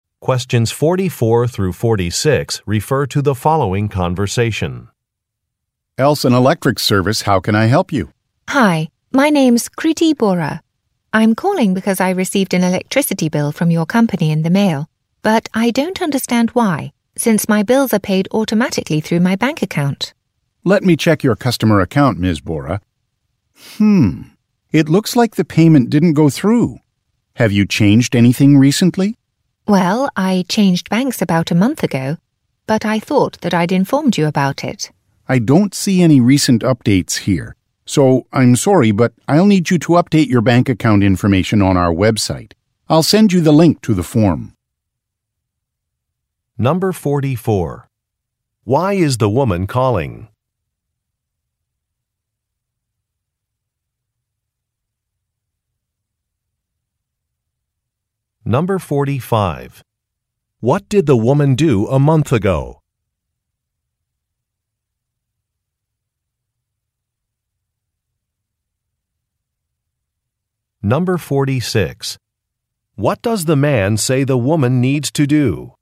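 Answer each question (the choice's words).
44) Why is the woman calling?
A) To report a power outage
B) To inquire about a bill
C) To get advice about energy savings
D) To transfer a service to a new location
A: To inquire about a bill

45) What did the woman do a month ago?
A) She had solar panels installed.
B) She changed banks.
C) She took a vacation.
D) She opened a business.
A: She changed banks.

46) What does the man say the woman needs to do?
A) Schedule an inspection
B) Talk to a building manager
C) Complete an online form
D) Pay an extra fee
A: Complete an online form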